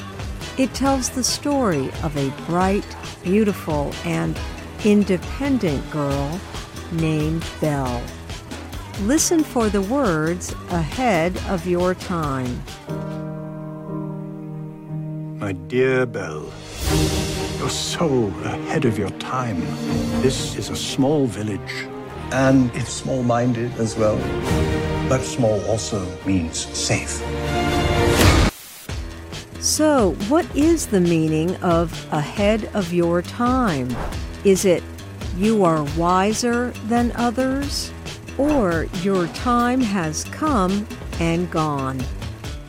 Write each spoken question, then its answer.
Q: So, what is the meaning of ahead of your time?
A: Ahead of your time means you are wiser than others.